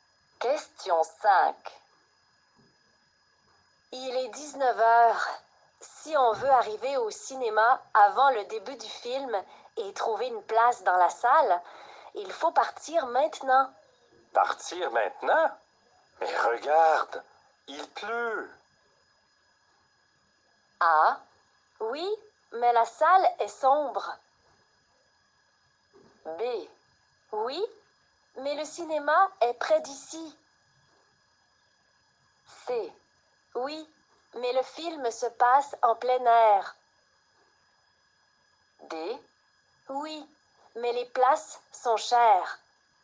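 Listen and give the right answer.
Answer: B: Oui, mais le cinéma est près d'ici.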